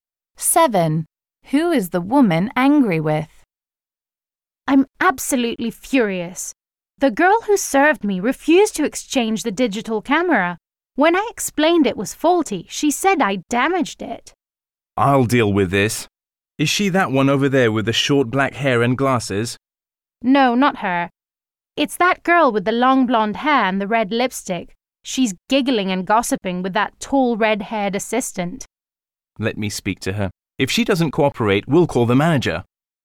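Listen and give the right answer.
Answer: The shop assistant with long blonde hair and red lipstick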